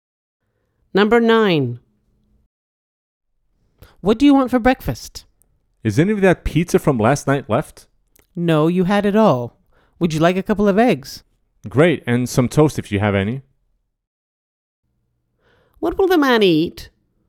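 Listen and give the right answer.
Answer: eggs and toast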